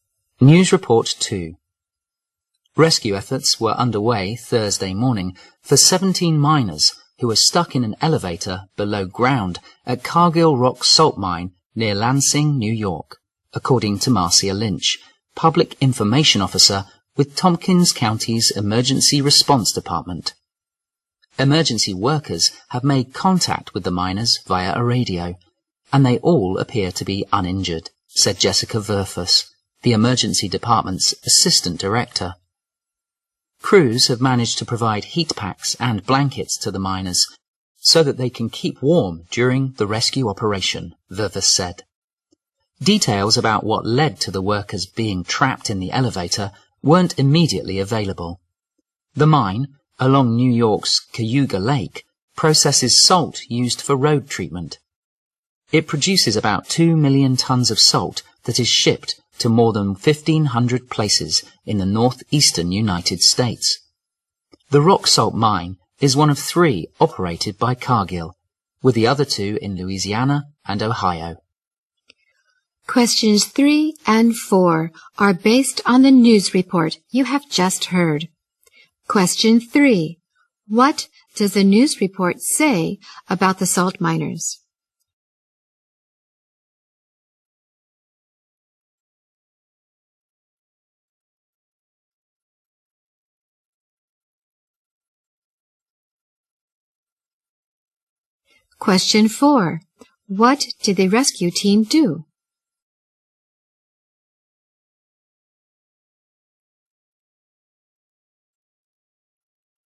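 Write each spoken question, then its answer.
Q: What does the news report say about the salt miners?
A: 17 miners were stuck in an elevator below ground, uninjured

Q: What did the rescue team do?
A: Provided heat packs and blankets to keep the miners warm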